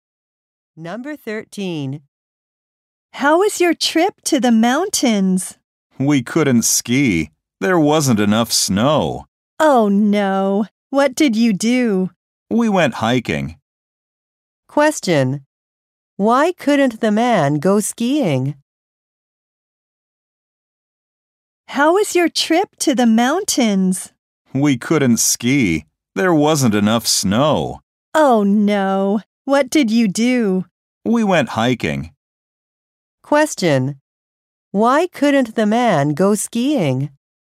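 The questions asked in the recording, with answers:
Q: Why couldn't the man go skiing?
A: There wasn't enough snow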